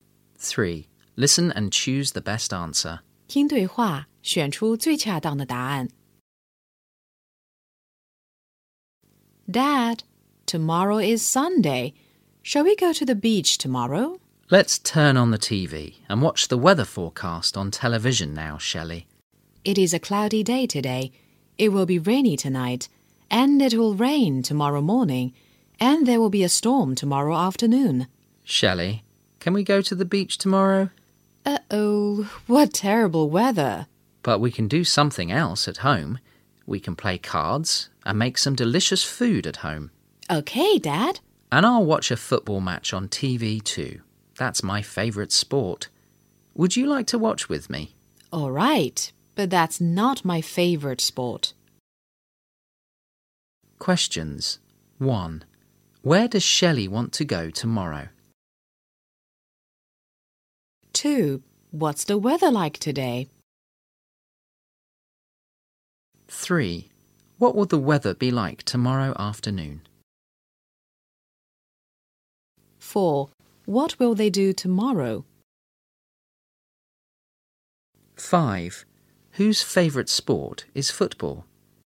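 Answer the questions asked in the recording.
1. To the beach
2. Cloudy
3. There will be a storm
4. Play cards and make delicious food at home (and watch a football match on TV)
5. Shelley's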